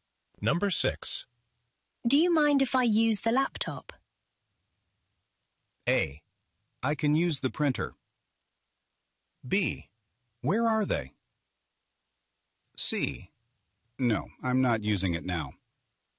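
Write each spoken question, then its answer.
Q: Do you mind if I use the laptop?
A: C: No, I'm not using it now.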